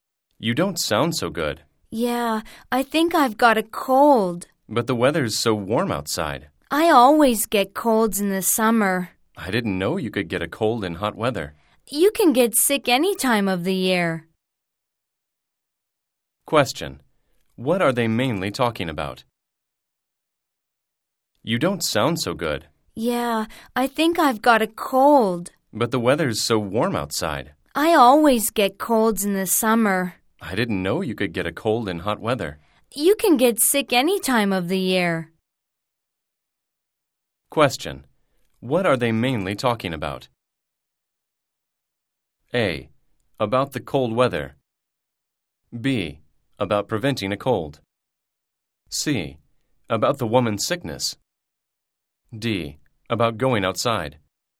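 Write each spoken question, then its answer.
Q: What are they mainly talking about?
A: C: About the woman's sickness.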